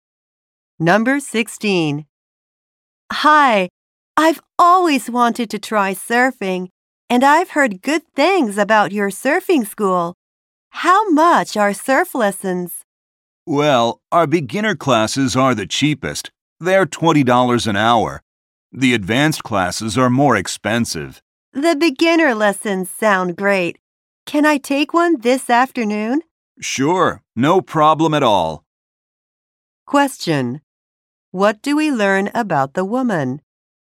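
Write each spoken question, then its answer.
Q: What do we learn about the woman?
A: She wants to take a beginner surfing lesson this afternoon.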